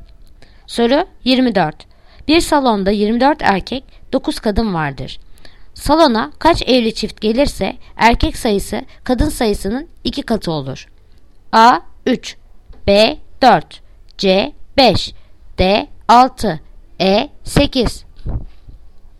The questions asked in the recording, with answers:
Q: Salona kaç evli çift gelirse erkek sayısı kadın sayısının 2 katı olur.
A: Yanıt Diyarbakır 6